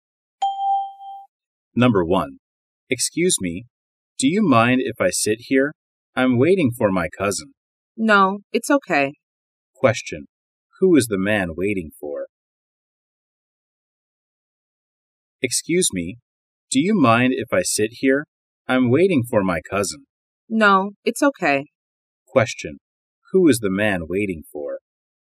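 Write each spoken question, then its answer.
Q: Who is the man waiting for?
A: His cousin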